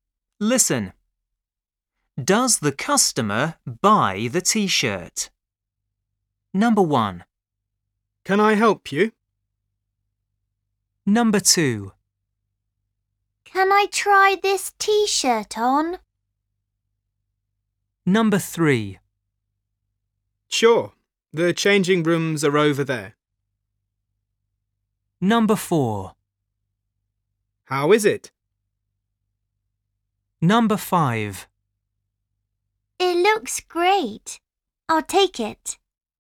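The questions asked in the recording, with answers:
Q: Does the customer buy the T-shirt?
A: Yes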